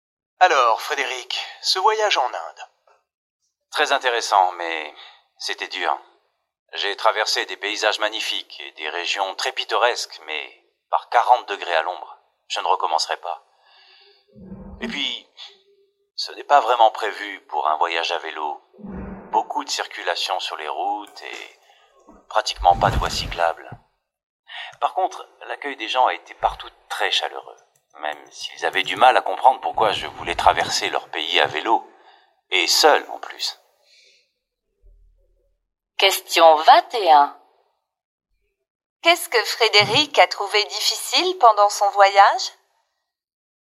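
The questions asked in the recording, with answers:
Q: Qu'est-ce que Frédéric a trouvé difficile pendant son voyage?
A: La chaleur et la circulation sans voies cyclables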